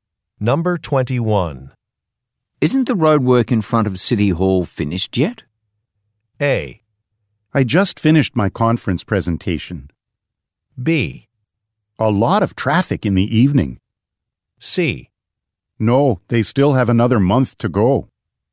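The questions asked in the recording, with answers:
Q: Isn't the road work in front of City Hall finished yet?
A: C: No, they still have another month to go.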